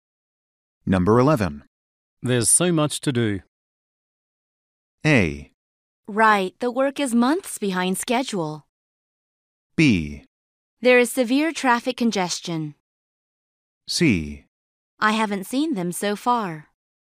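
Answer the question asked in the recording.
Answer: A: Right, the work is months behind schedule.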